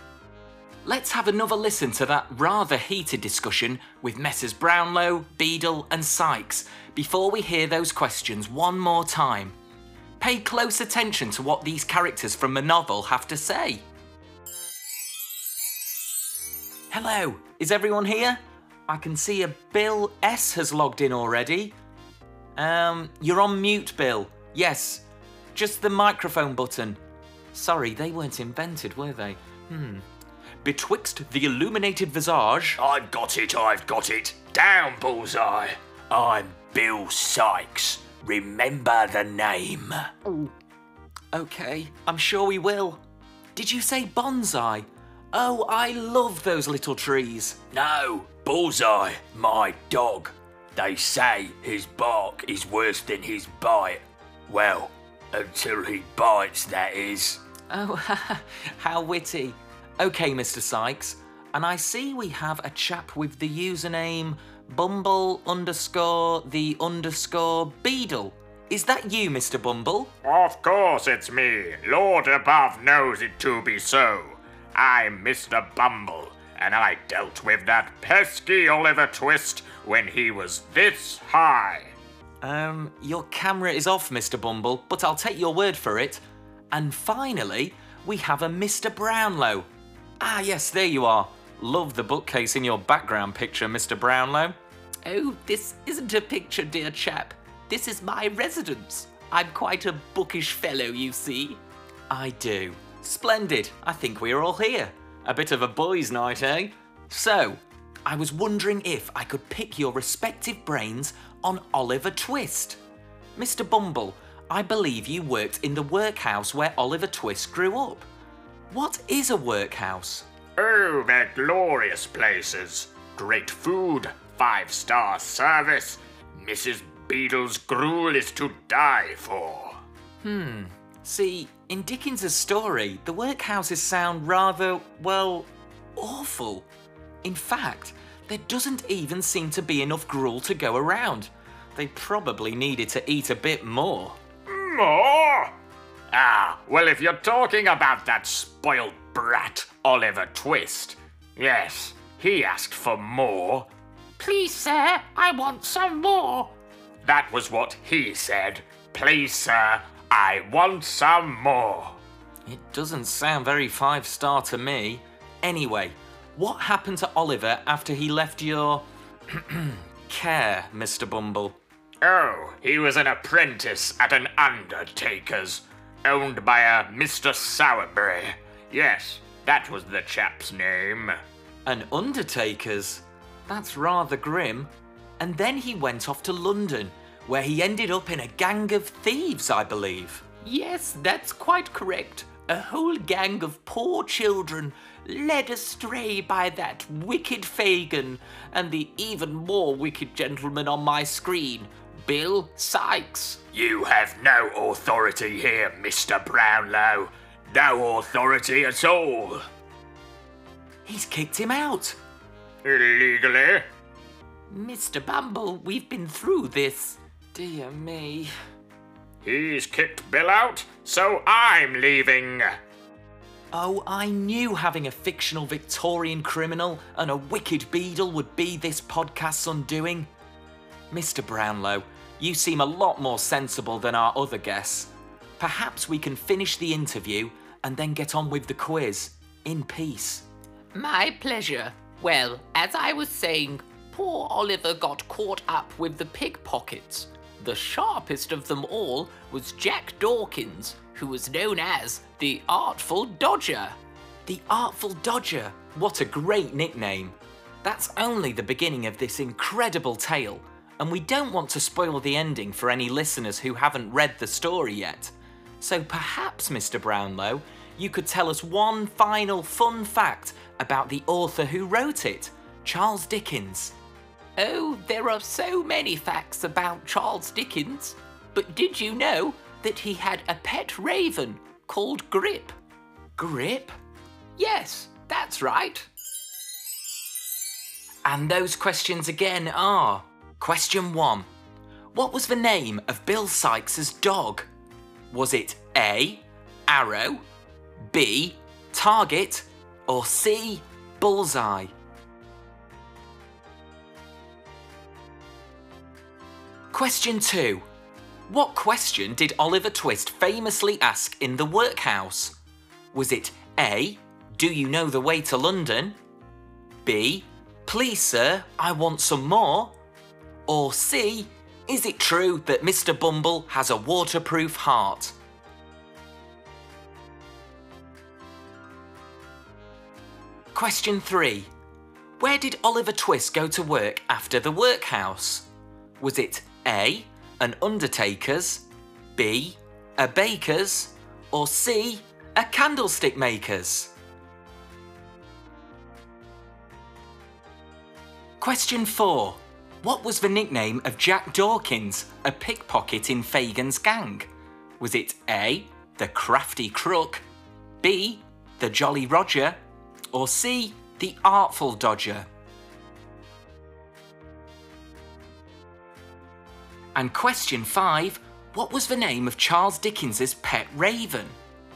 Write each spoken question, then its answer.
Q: What was the name of Bill Sykes's dog?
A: So the answer is C, Bullseye.

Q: What question did Oliver Twist famously ask in the workhouse?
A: the answer is B.

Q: Where did Oliver Twist go to work after the workhouse?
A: The answer is A. He becomes an apprentice to an undertaker.

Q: What was the nickname of Jack Dawkins, a pickpocket in Fagin's gang?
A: So the answer is C, the Artful Dodger.

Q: what was the name of Charles Dickens's pet raven?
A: Dickens was rather fond of his feathered friend called Grip